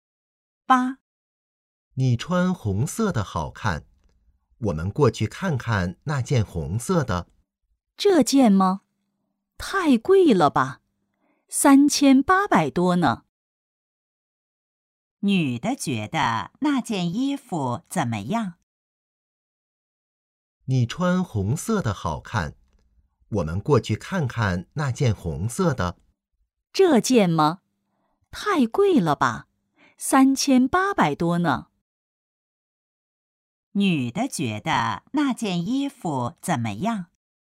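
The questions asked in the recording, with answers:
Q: 女的觉得那件衣服怎么样?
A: 太贵了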